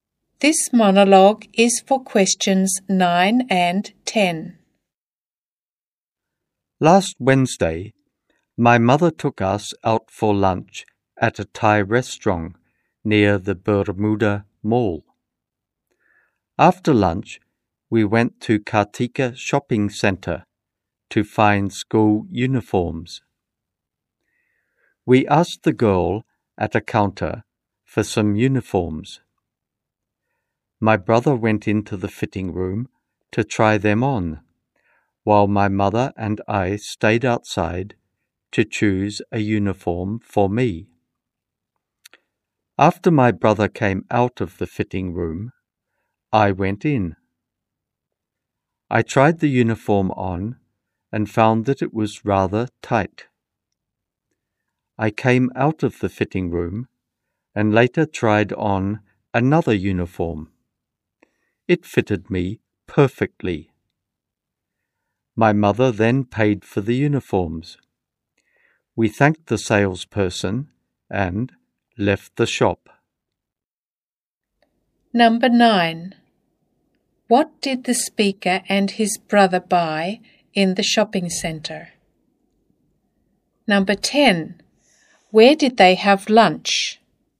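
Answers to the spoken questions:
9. School uniforms
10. At a Thai restaurant near the Bermuda Mall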